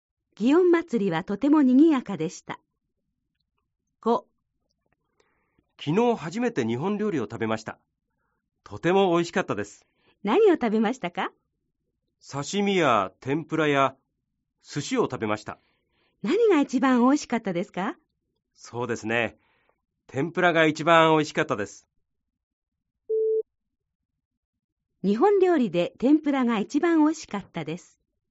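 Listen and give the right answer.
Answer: ○(正しい)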